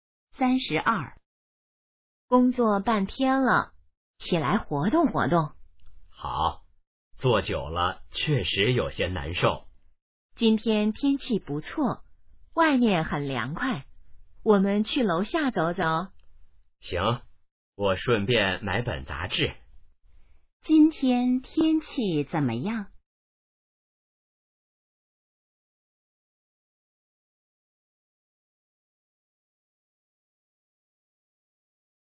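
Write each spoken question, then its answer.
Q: 今天天气怎么样?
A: 不错,很凉快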